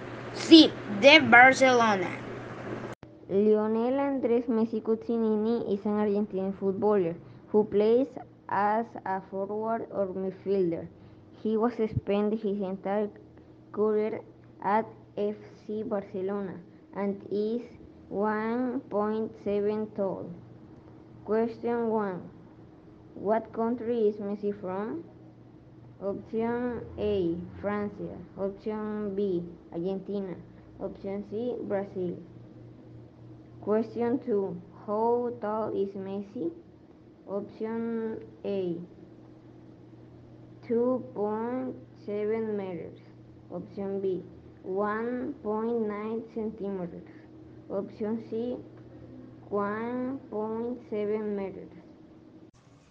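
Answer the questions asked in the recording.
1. B: Argentina.
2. C: 1.7 meters.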